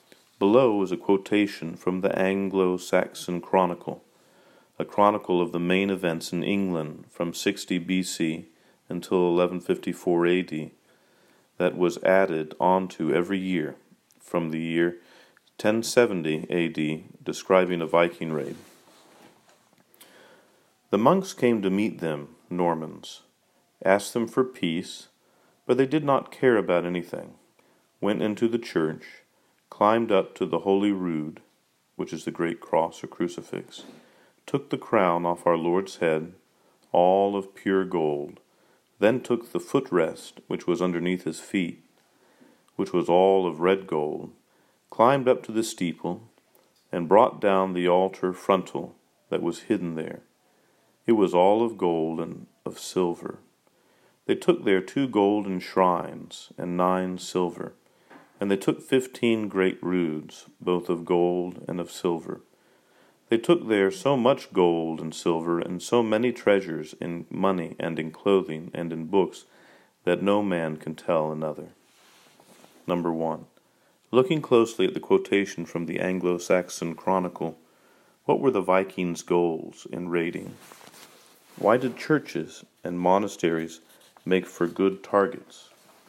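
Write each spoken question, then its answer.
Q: Looking closely at the quotation from the Anglo-Saxon Chronicle, what were the Vikings' goals in raiding?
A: To steal treasure: gold, silver, money, clothing and books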